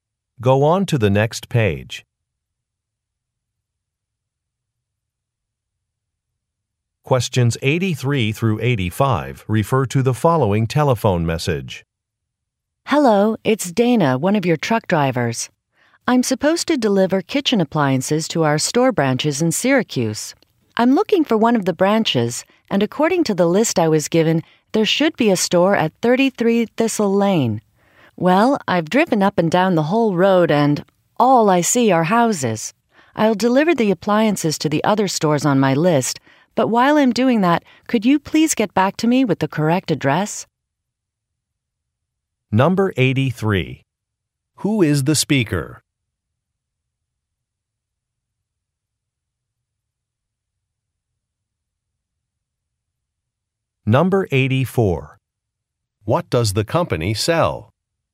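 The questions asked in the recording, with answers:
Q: Who is the speaker?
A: A truck driver

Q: What does the company sell?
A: Kitchen appliances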